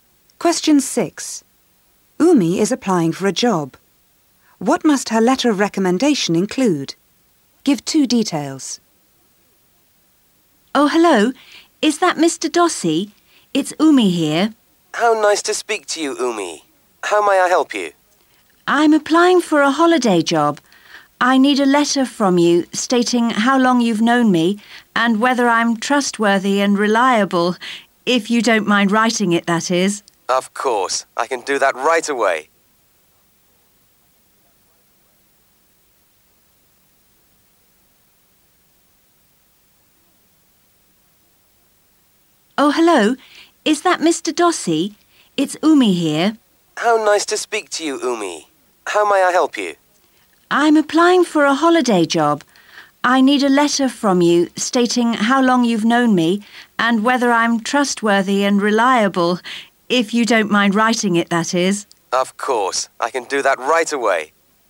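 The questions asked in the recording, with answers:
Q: What must her letter of recommendation include?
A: How long he has known her, and whether she is trustworthy and reliable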